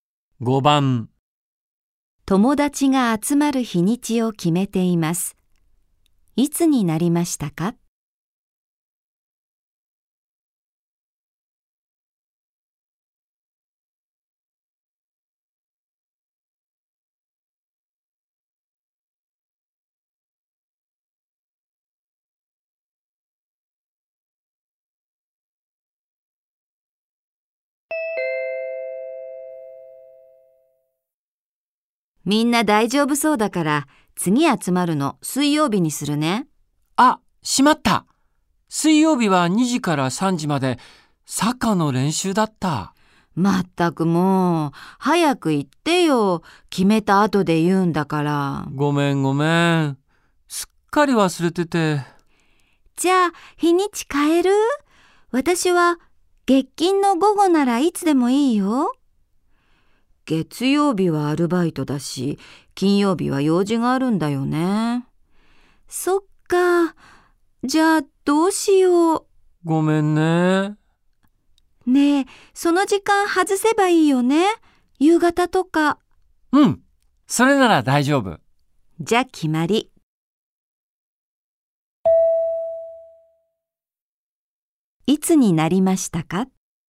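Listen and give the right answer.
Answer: 水曜日の夕方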